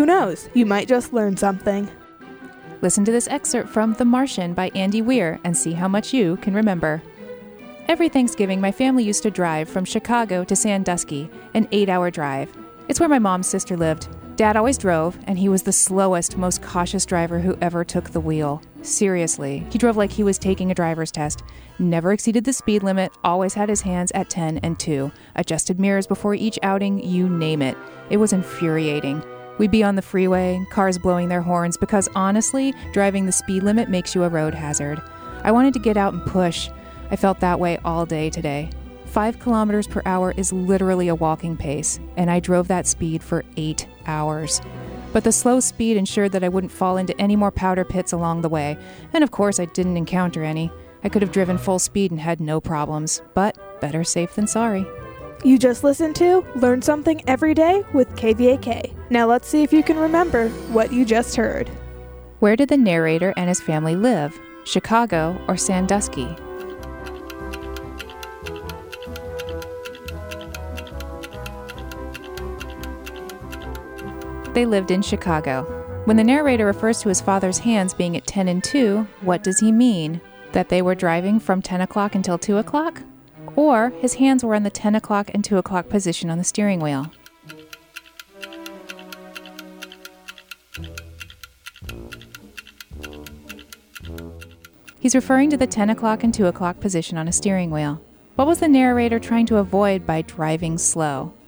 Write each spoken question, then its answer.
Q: Where did the narrator and his family live?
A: They lived in Chicago.

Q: What was the narrator trying to avoid by driving slow?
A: The answer is powder pits.